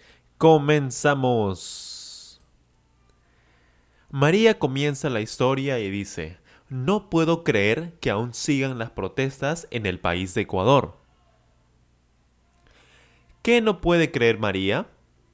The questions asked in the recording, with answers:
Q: ¿Qué no puede creer María?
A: María no puede creer que aún sigan las protestas, que aún continúen las protestas.